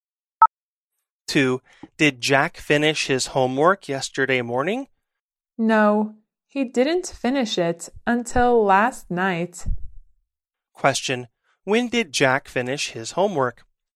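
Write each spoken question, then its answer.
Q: When did Jack finish his homework?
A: Last night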